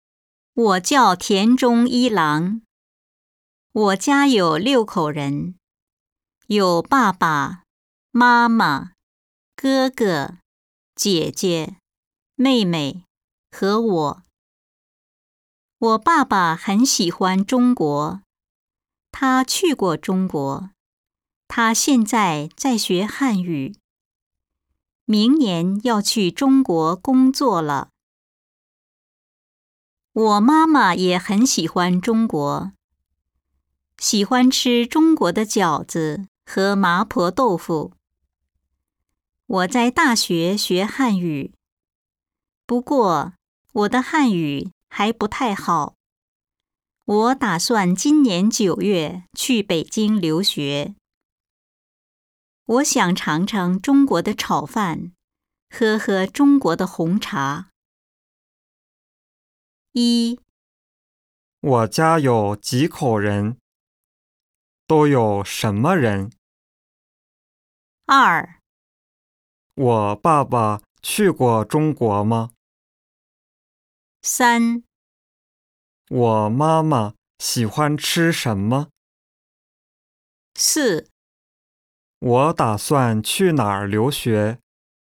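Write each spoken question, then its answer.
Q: 我家有几口人?都有什么人?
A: 六口人:爸爸、妈妈、哥哥、姐姐、妹妹和我

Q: 我爸爸去过中国吗?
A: 去过

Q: 我妈妈喜欢吃什么?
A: 中国的饺子和麻婆豆腐

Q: 我打算去哪儿留学?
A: 北京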